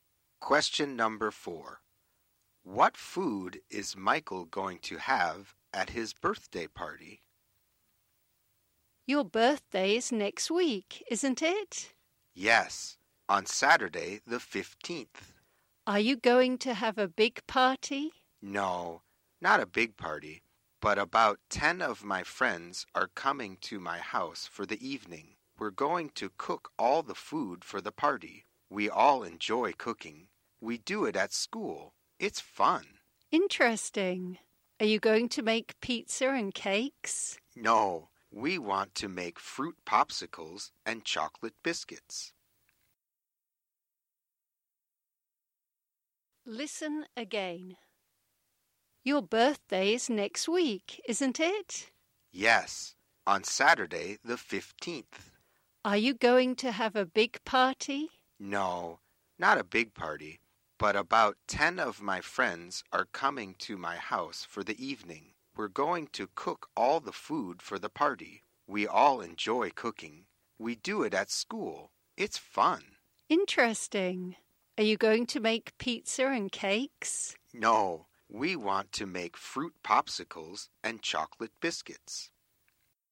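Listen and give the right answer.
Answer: Fruit popsicles and chocolate biscuits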